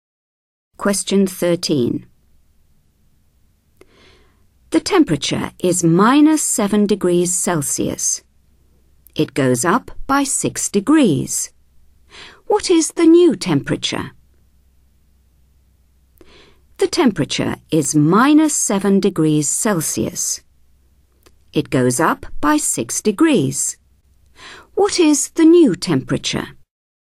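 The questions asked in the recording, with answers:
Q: What is the new temperature?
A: -1 degree Celsius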